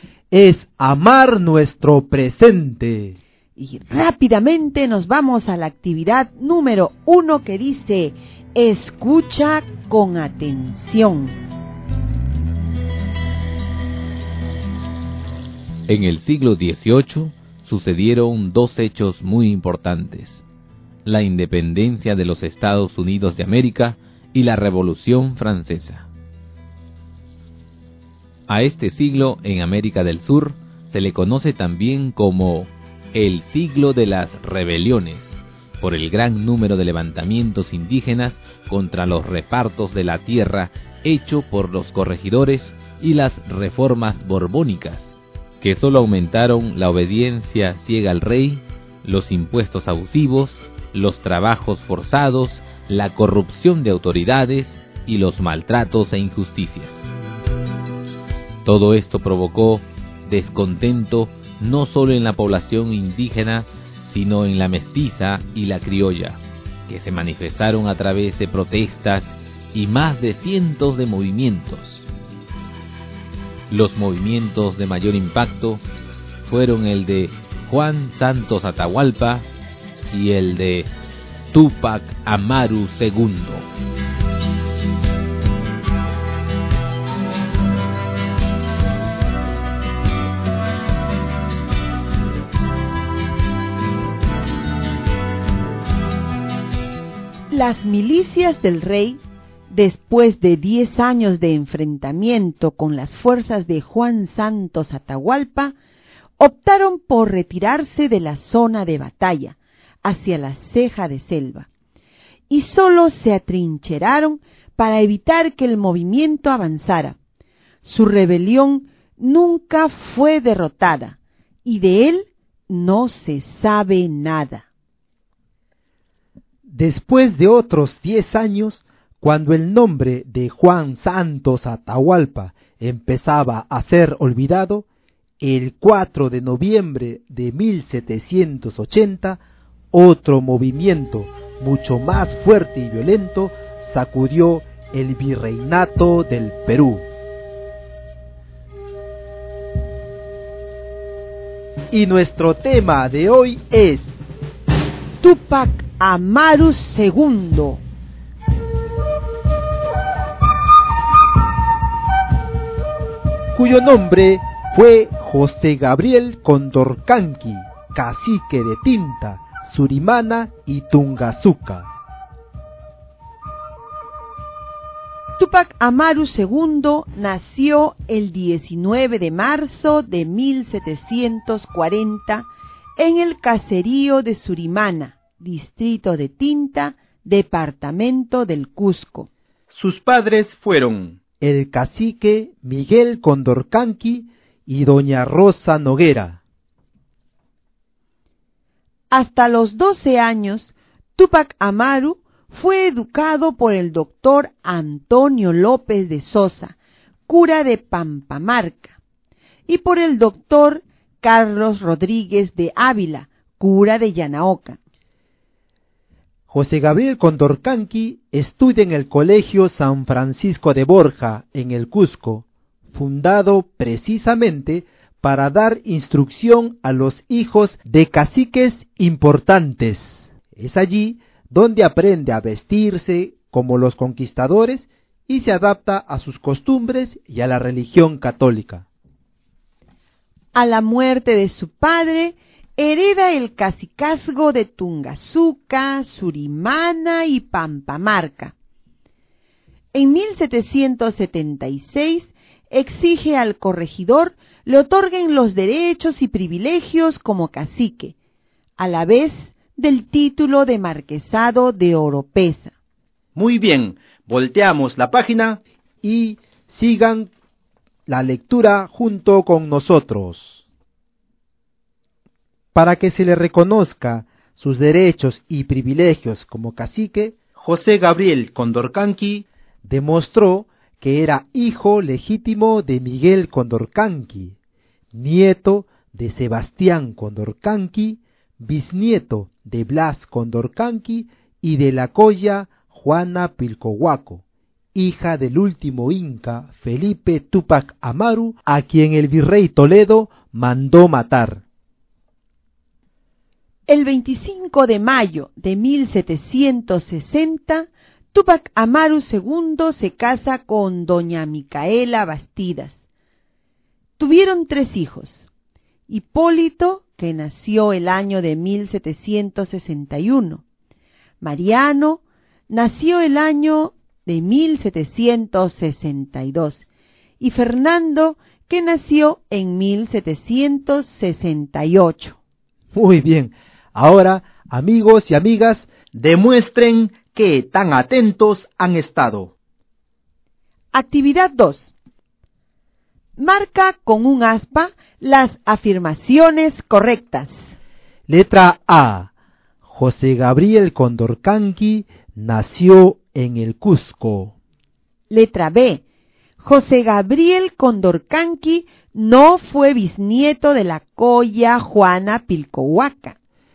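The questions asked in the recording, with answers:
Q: José Gabriel Condorcanqui nació en el Cusco.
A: Correcta (verdadero)

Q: José Gabriel Condorcanqui no fue bisnieto de la colla Juana Pilcohuaca.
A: Incorrecta (falso)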